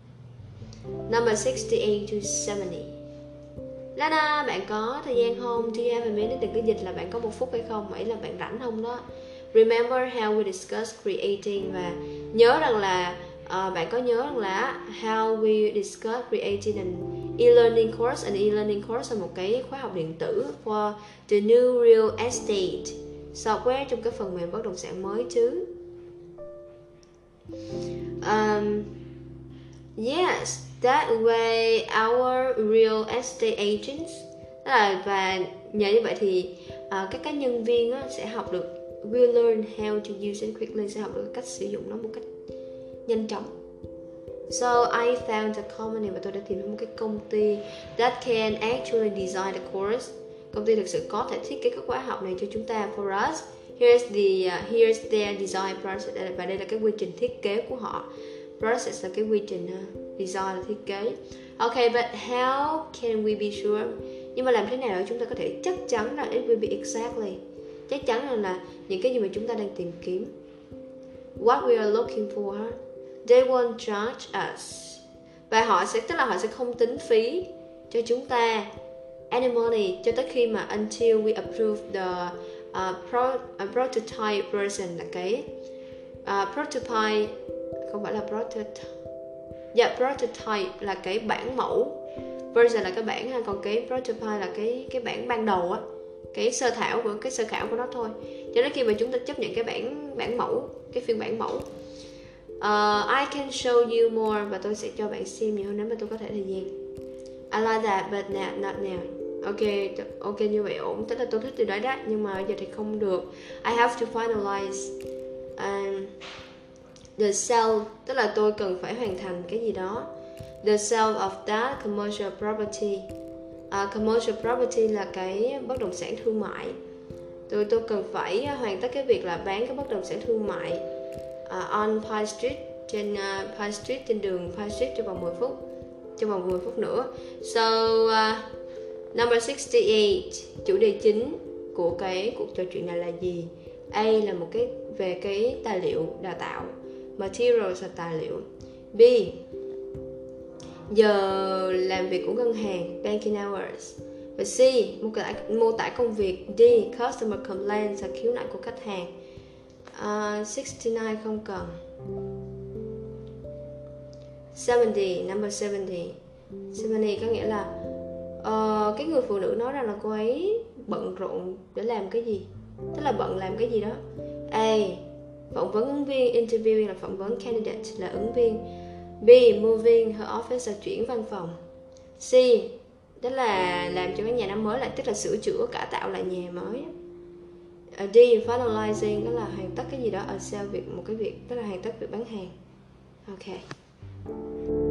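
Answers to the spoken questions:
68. A: tài liệu đào tạo
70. D: hoàn tất việc bán hàng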